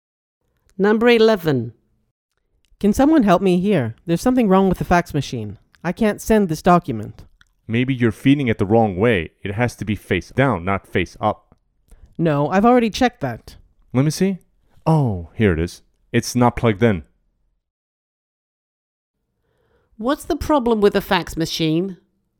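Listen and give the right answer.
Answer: It's not plugged in.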